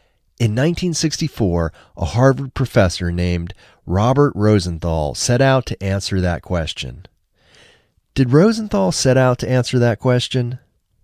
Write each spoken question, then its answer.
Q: Did Rosenthal set out to answer that question?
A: Yes, Rosenthal set out to answer that question.